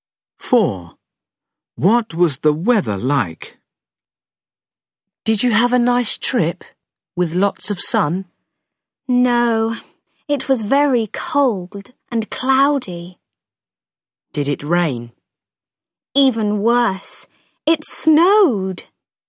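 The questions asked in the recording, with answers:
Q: What was the weather like?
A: cold, cloudy and snowy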